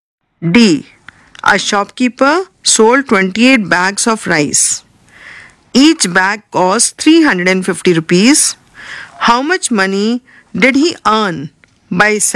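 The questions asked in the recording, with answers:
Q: How much money did he earn by selling?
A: 9800 rupees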